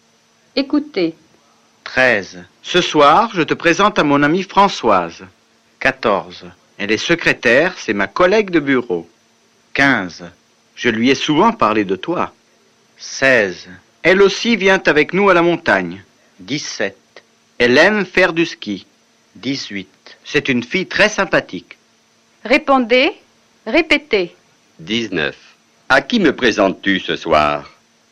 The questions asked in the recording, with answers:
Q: À qui me présentes-tu ce soir?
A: Ce soir, je te présente à mon amie Françoise.